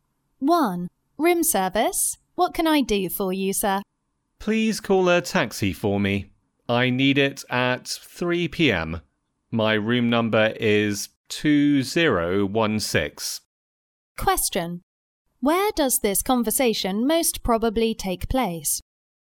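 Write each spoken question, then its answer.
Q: Where does this conversation most probably take place?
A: In a hotel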